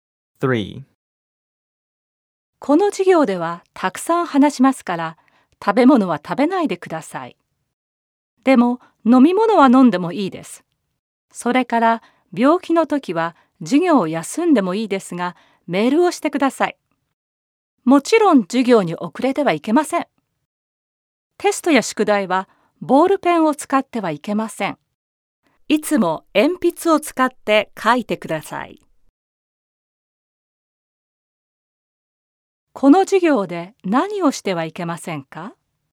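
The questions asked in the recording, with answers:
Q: この授業で何をしてはいけませんか?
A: 食べ物を食べること、授業に遅れること、テストや宿題でボールペンを使うこと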